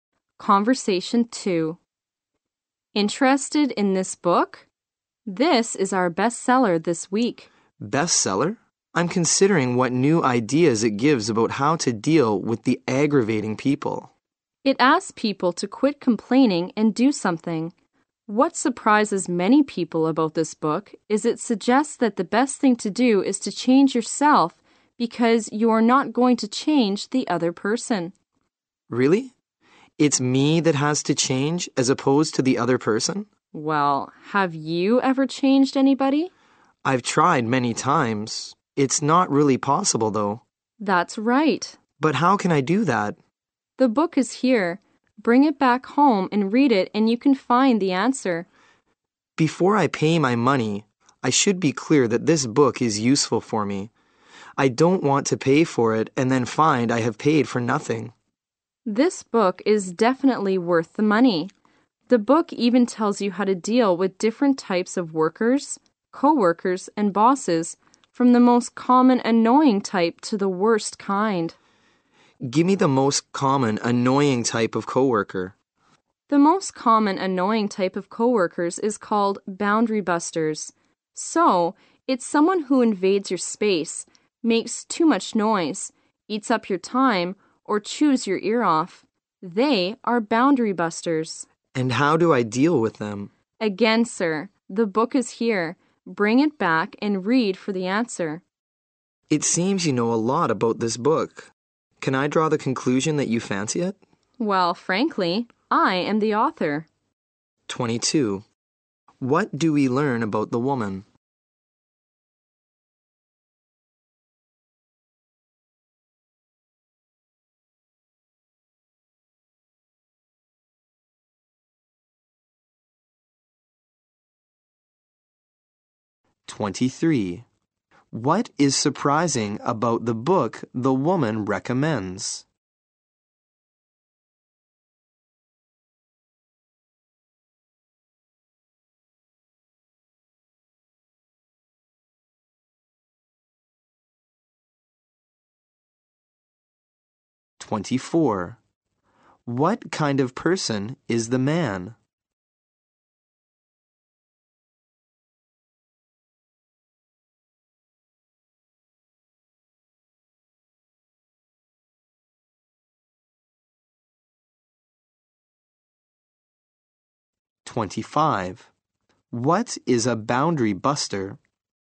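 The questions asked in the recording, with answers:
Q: What do we learn about the woman?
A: She is the author of the book

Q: What is surprising about the book the woman recommends?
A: It suggests you change yourself rather than the other person

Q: What is a boundary buster?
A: A co-worker who invades your space, makes too much noise, eats up your time or chews your ear off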